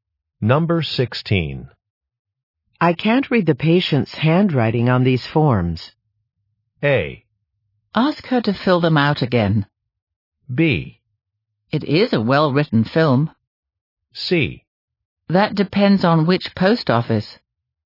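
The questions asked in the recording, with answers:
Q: I can't read the patient's handwriting on these forms.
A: A: Ask her to fill them out again.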